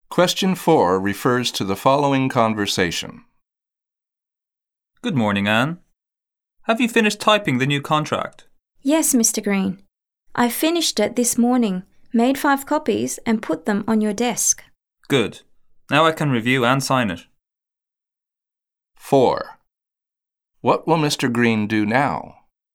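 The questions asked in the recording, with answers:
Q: What will Mr. Green do now?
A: Review and sign the contract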